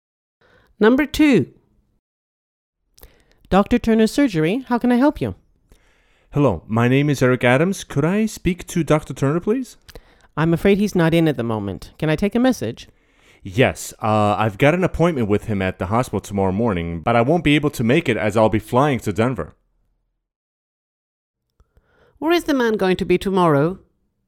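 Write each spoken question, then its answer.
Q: Where is the man going to be tomorrow?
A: in Denver (flying there)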